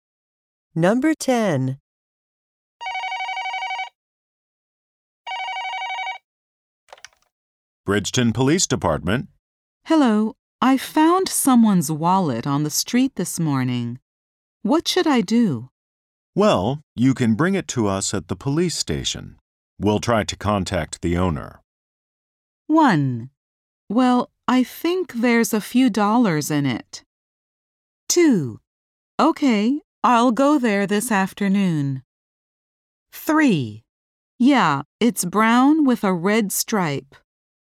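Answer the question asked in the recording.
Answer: 2: Okay, I'll go there this afternoon.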